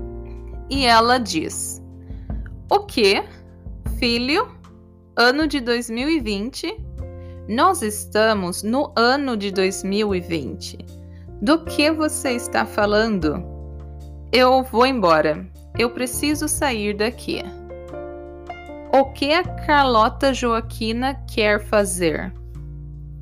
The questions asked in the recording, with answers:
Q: O que a Carlota Joaquina quer fazer?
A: Sair.